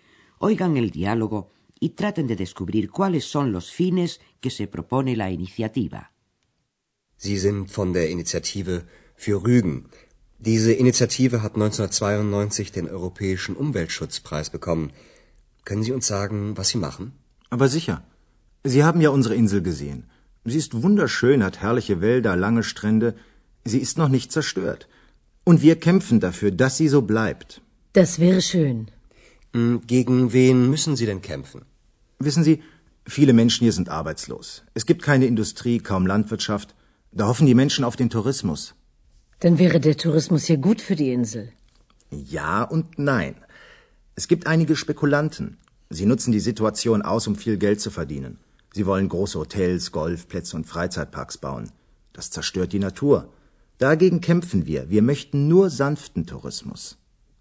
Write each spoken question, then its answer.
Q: Oigan el diálogo y traten de descubrir cuáles son los fines que se propone la iniciativa.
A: El fin de la iniciativa es conseguir que venga a Rügen el turismo llamado suave, por contraposición al turismo de masas, masivo.